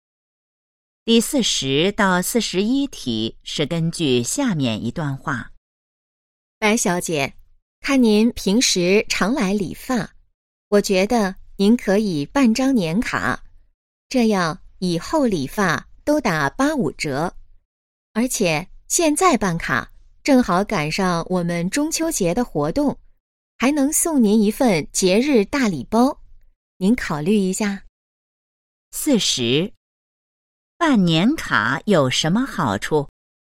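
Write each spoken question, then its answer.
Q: 办年卡有什么好处?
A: 以后理发都打85折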